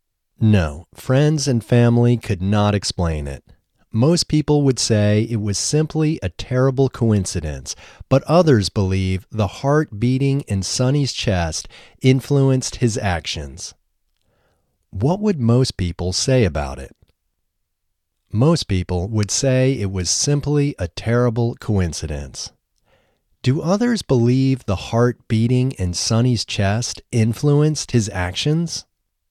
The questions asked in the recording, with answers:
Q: What would most people say about it?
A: Most people would say it was simply a terrible coincidence.

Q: Do others believe the heart beating in Sonny's chest influenced his actions?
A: Yes, others believe the heart beating in Sonny's chest influenced his actions.